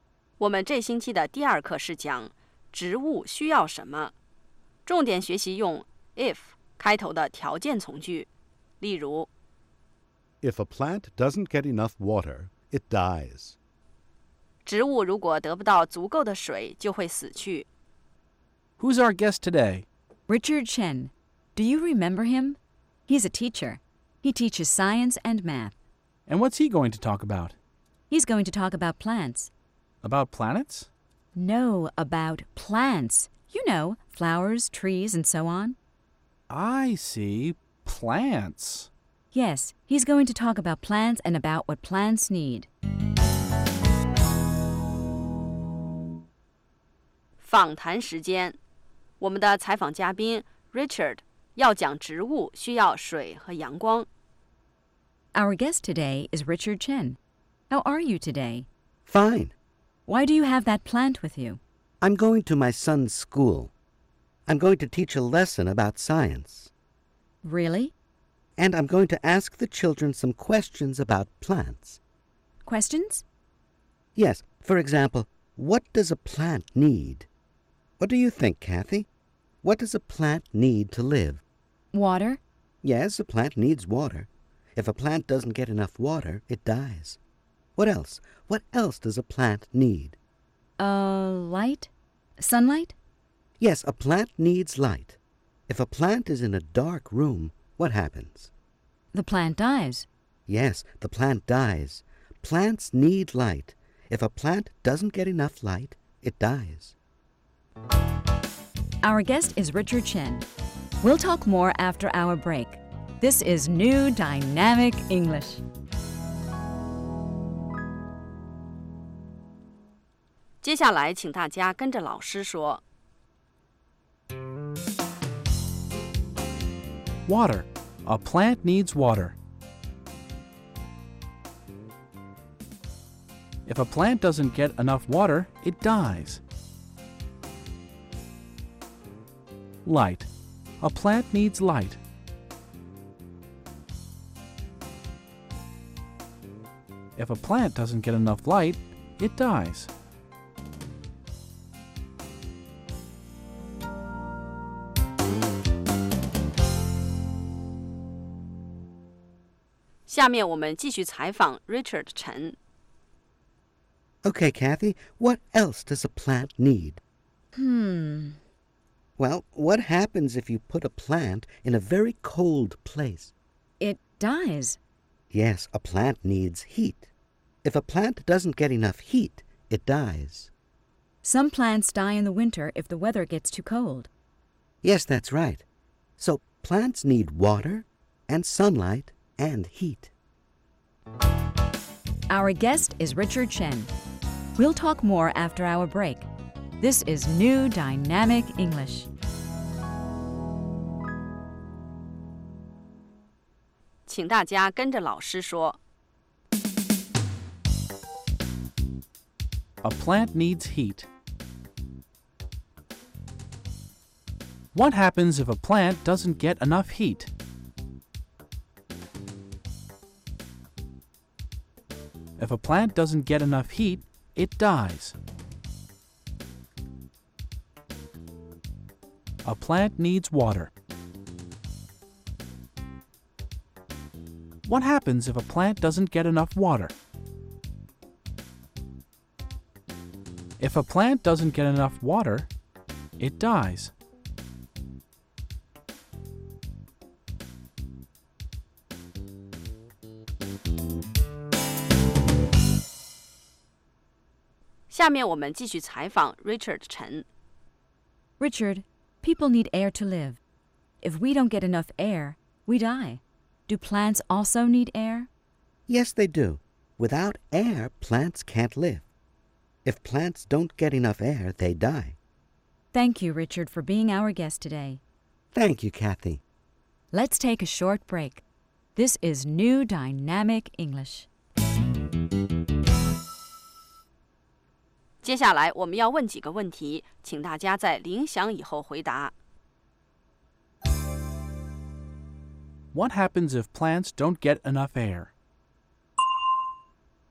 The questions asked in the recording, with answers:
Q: What happens if plants don't get enough air?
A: They die. If plants don't get enough air, they die.